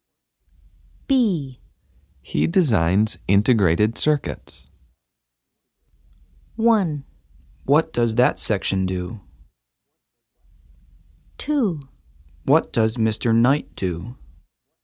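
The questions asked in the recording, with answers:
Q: He designs integrated circuits.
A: 2: What does Mr. Knight do?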